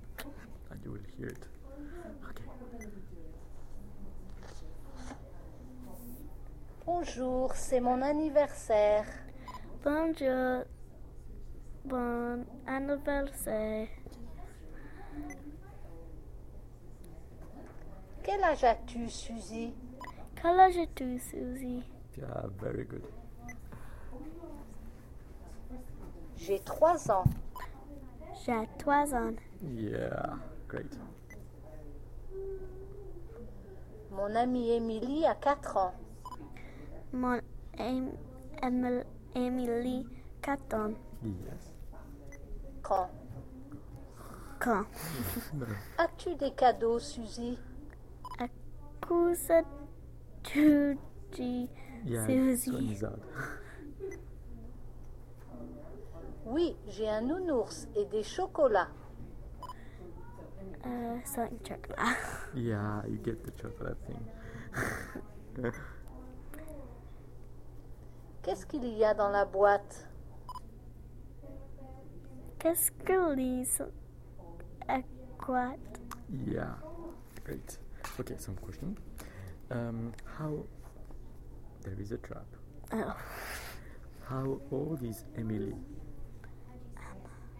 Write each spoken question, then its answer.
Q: How old is Emily?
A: Suzy is 3, but Emily was 4.